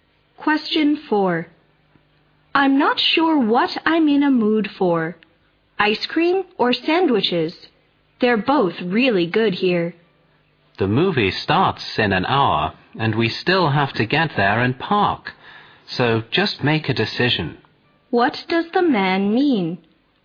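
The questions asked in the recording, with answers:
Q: What does the man mean?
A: The woman should decide quickly because they are short of time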